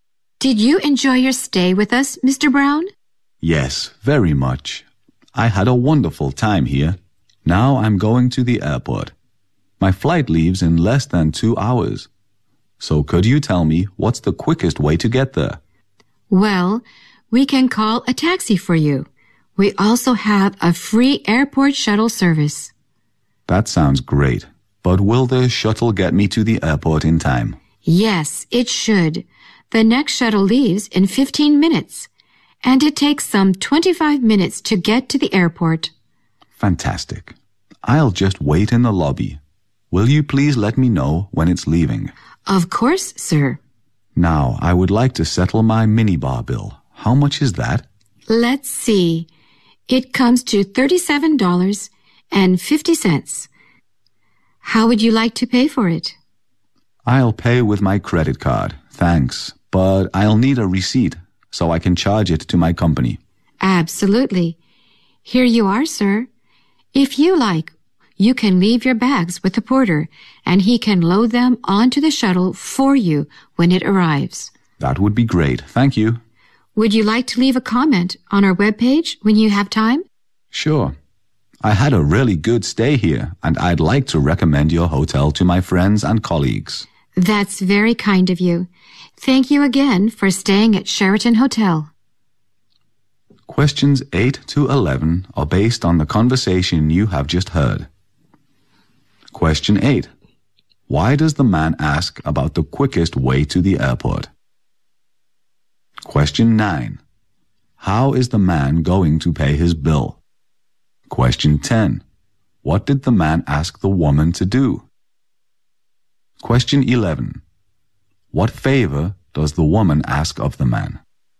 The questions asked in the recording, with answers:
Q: Why does the man ask about the quickest way to the airport?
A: because his flight leaves in less than 2 hours。

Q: How is the man going to pay his bill?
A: He's going to pay with his credit card.

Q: What did the man ask the woman to do?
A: He asks the woman to let him know when the shuttle bus of the hotel leaves the hotel。

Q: What favor... Does the woman ask of the man?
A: So the woman asks the man to leave his comment on the company web page。